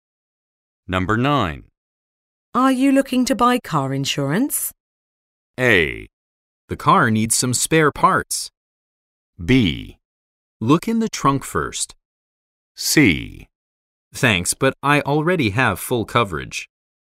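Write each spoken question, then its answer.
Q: Are you looking to buy car insurance?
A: C: Thanks, but I already have full coverage.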